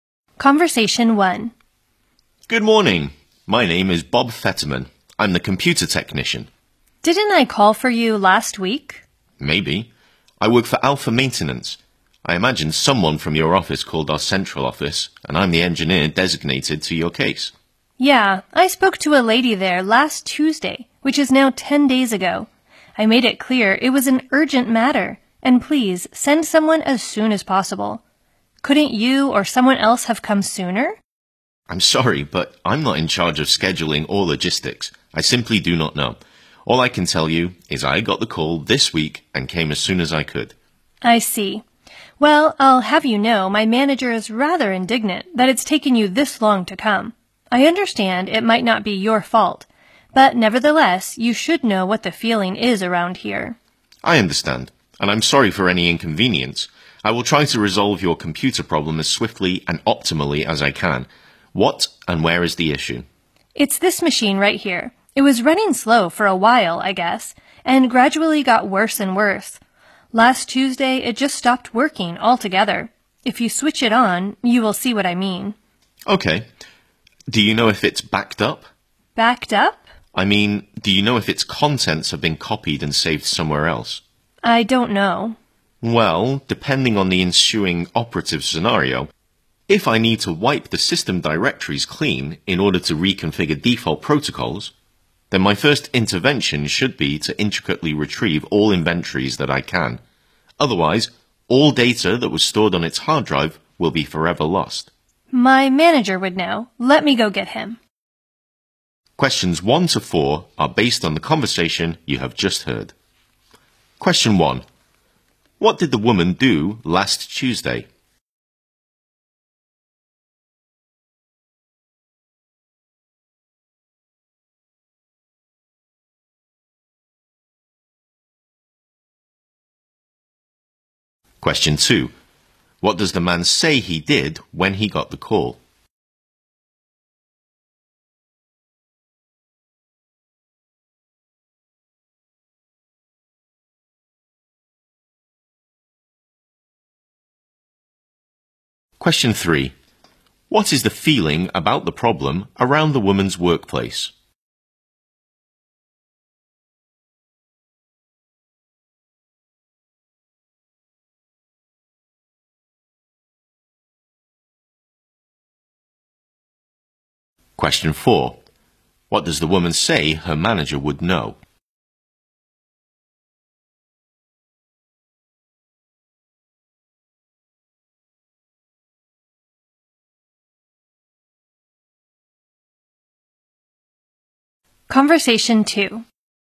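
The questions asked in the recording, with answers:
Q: What did the woman do last Tuesday?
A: She called the central office and asked for someone to be sent urgently.

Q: What does the man say he did when he got the call?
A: He came as soon as he could.

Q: What is the feeling about the problem around the woman's workplace?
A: Her manager is indignant that it took so long.

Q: What does the woman say her manager would know?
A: Whether the computer is backed up.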